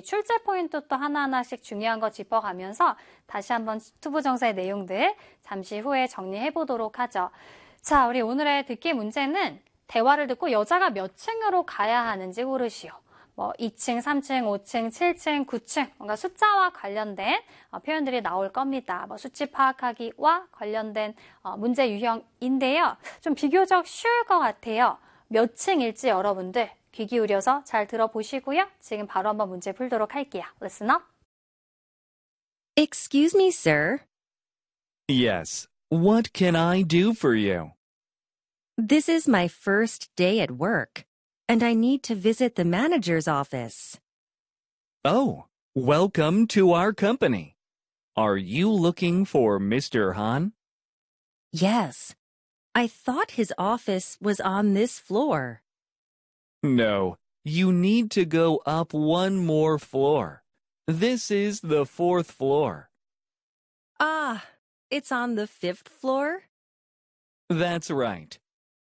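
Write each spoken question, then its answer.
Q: 대화를 듣고 여자가 몇 층으로 가야 하는지 고르시오.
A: 5층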